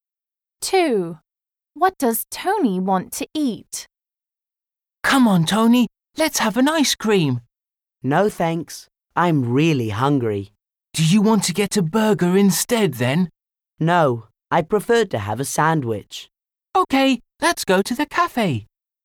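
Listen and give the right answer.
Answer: a sandwich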